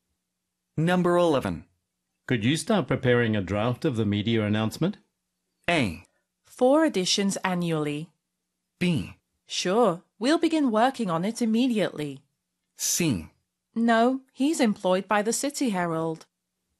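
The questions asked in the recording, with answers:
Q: Could you start preparing a draft of the media announcement?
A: B: Sure, we'll begin working on it immediately.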